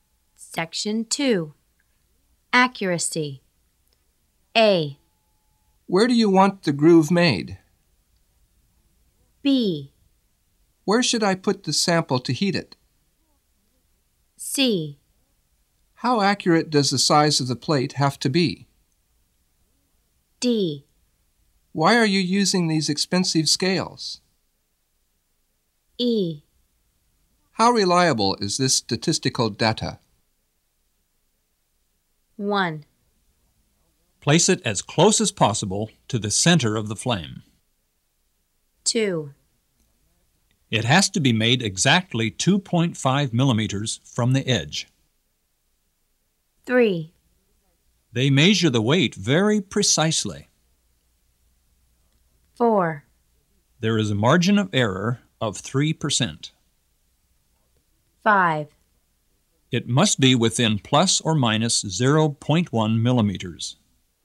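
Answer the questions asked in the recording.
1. B: Where should I put the sample to heat it?
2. A: Where do you want the groove made?
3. D: Why are you using these expensive scales?
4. E: How reliable is this statistical data?
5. C: How accurate does the size of the plate have to be?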